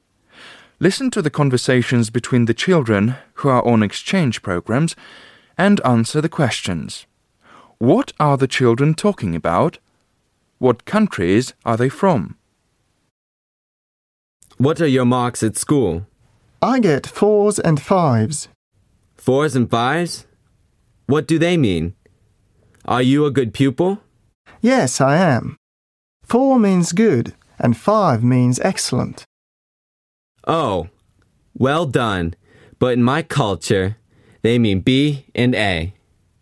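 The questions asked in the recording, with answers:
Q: What are the children talking about?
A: Their marks at school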